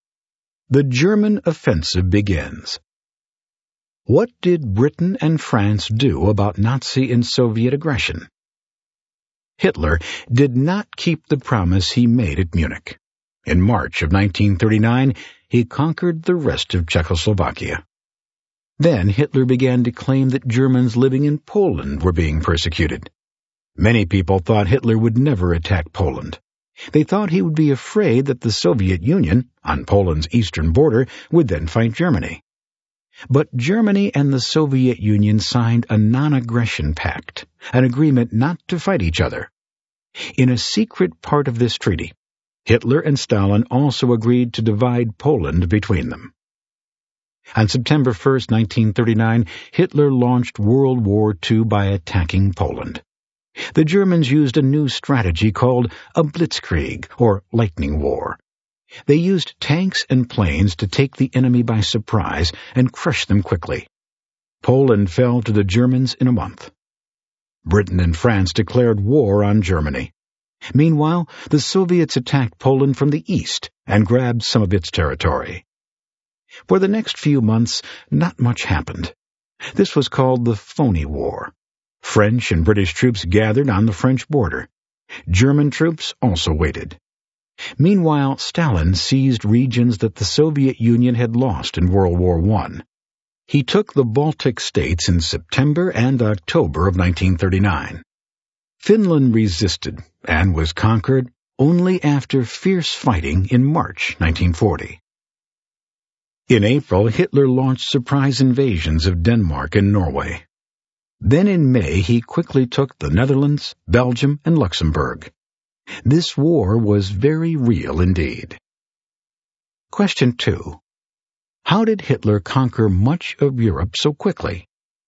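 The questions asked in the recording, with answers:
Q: How did Hitler conquer much of Europe so quickly?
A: With blitzkrieg (lightning war), using tanks and planes in surprise attacks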